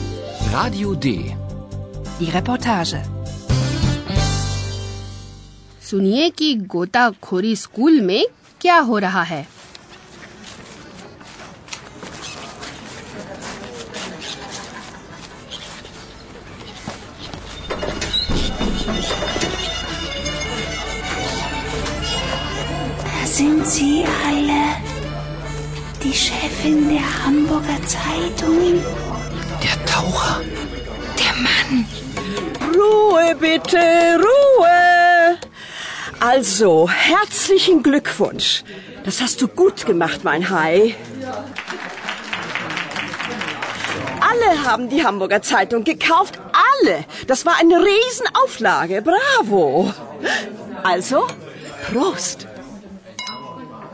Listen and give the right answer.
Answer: तो वहाँ गोताखोरी school और German अखबार के लोग मिलकर party कर रहे हैं